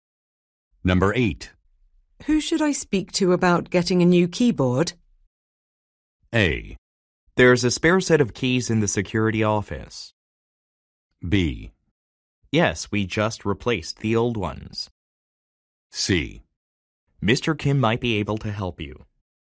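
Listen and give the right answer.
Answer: C: Mr. Kim might be able to help you.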